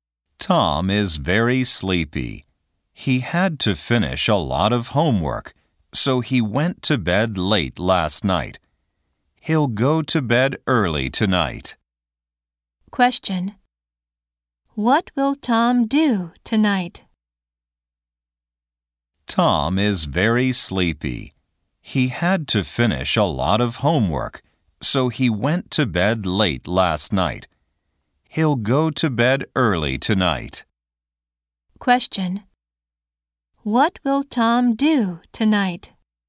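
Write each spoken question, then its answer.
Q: What will Tom do tonight?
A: He'll go to bed early.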